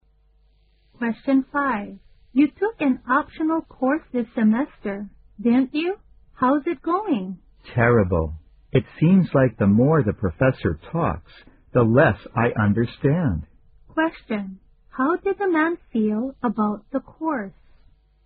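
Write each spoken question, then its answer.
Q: How did the man feel about the course?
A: He finds it terrible and hard to understand.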